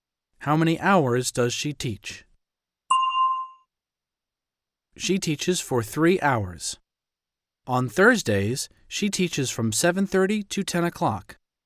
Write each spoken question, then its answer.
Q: How many hours does she teach?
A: She teaches for 2.5 hours.